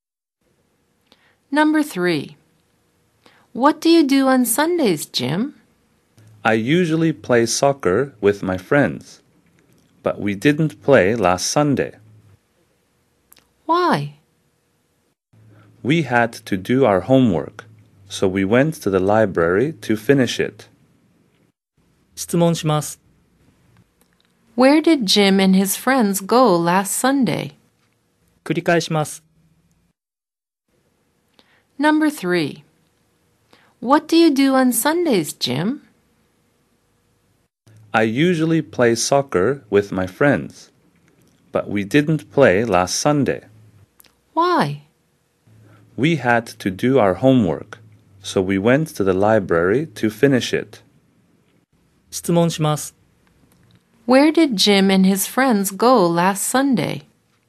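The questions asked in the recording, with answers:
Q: Where did Jim and his friends go last Sunday?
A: To the library.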